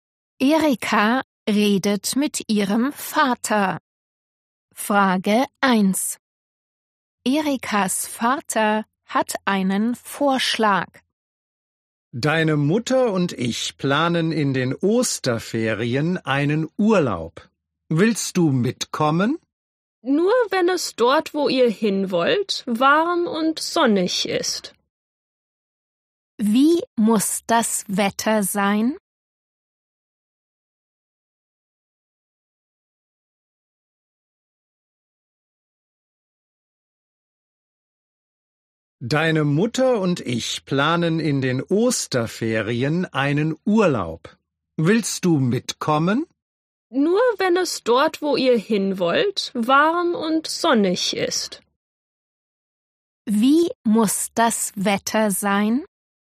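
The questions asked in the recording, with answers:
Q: Wie muss das Wetter sein?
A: warm und sonnig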